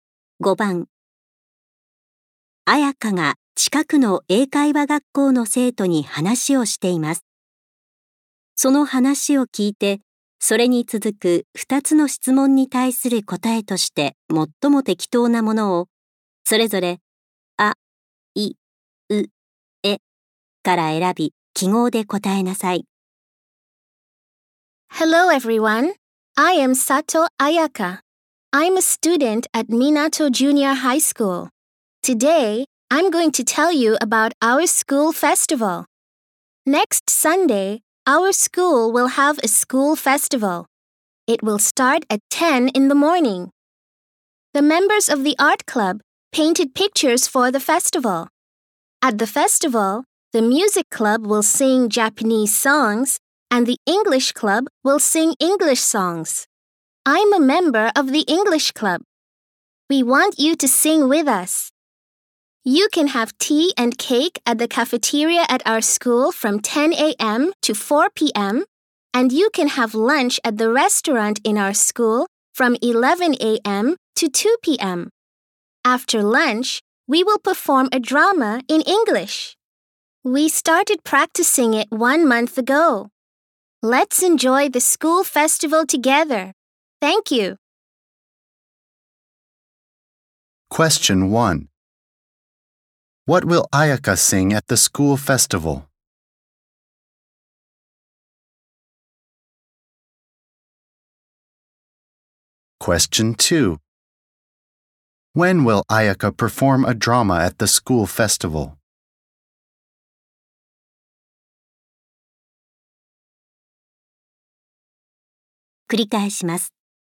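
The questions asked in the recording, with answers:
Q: What will Ayaka sing at the school festival?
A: English songs

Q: When will Ayaka perform a drama at the school festival?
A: After lunch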